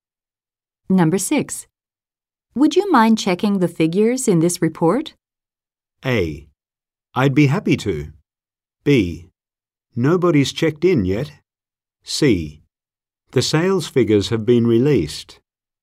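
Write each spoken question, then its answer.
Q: Would you mind checking the figures in this report?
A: A: I'd be happy to.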